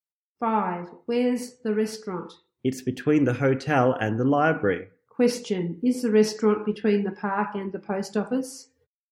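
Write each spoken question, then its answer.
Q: Is the restaurant between the park and the post office?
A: No, it's between the hotel and the library.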